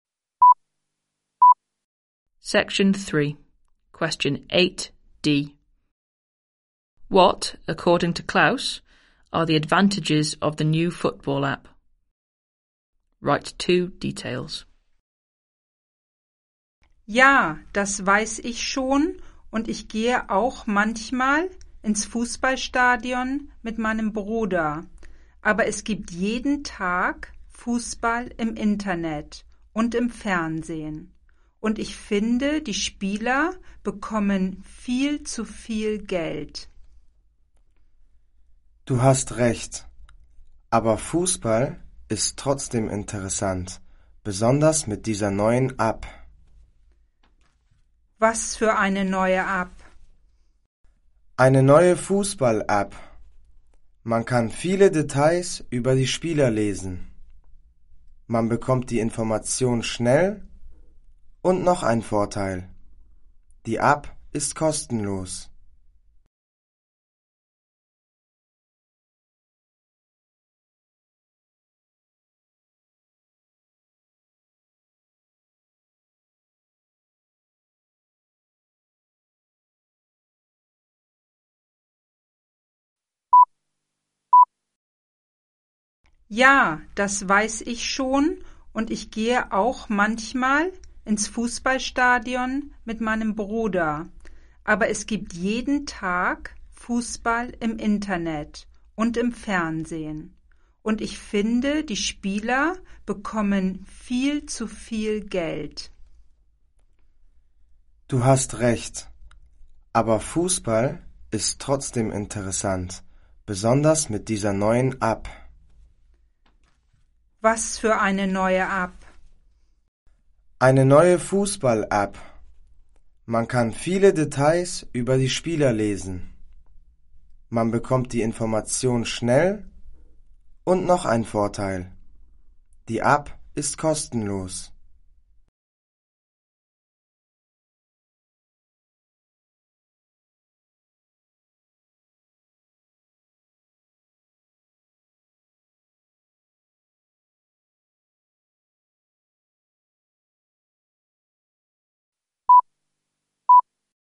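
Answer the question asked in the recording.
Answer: Lots of details about players; information quickly; it is free (any two)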